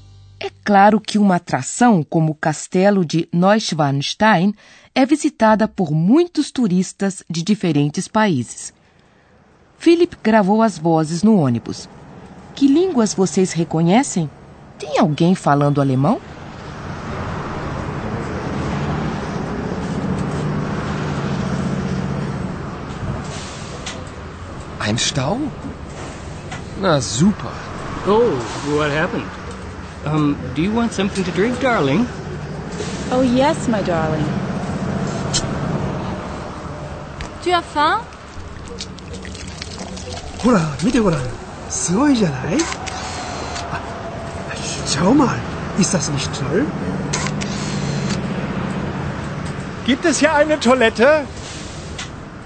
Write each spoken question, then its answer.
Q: Que línguas vocês reconhecem?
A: Talvez vocês tenham percebido frases em inglês e francês, ou até em japonês.